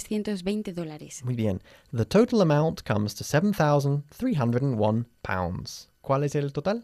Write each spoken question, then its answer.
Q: ¿Cuál es el total?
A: 7,301 libras.